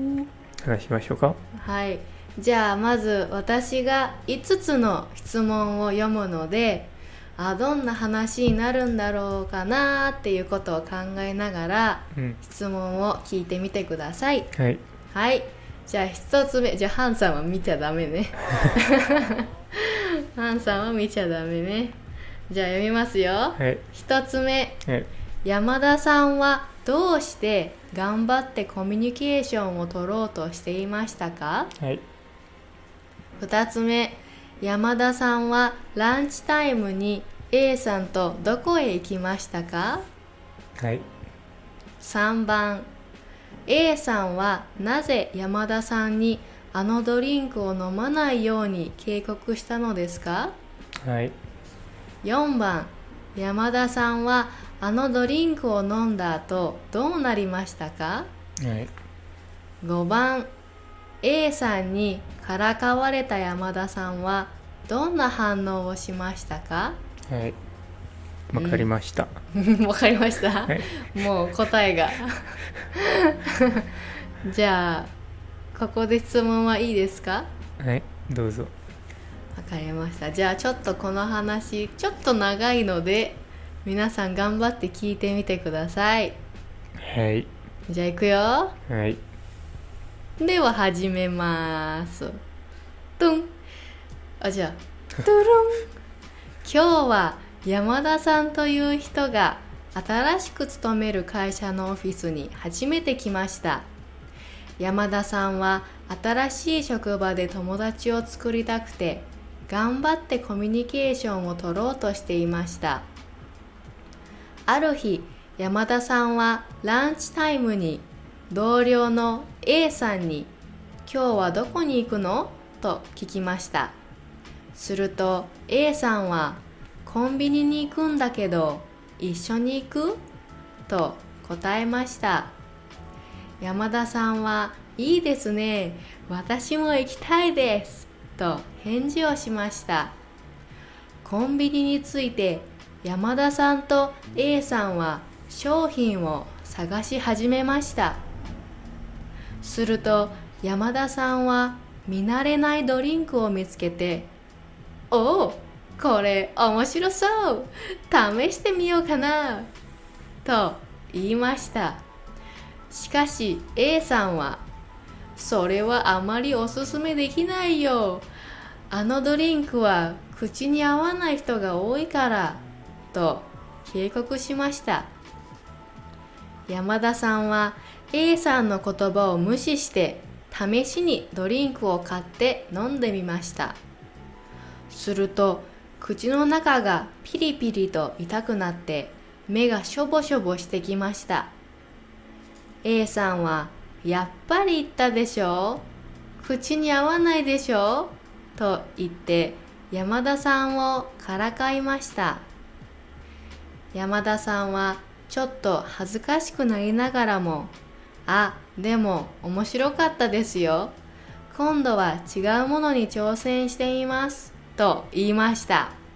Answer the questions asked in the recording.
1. 山田さんは新しい職場で友達を作りたかったから
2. 2番目の答えはコンビニでした
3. ドリンクが口に合わない人が多いから
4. 口がピリピリして痛くなって、目がしょぼしょぼして、しました
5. 山田さんは少し恥ずかしくなったけど面白かったですよ、